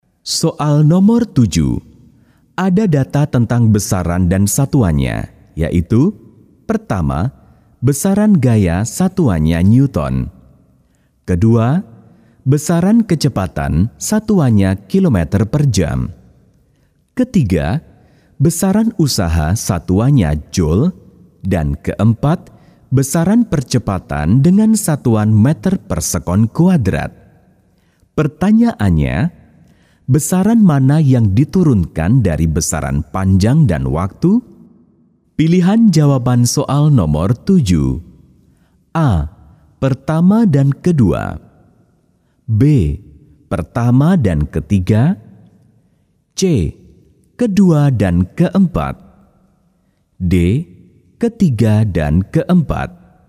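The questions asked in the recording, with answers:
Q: Pertanyaannya, besaran mana yang diturunkan dari besaran panjang dan waktu?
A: C: Kedua dan keempat.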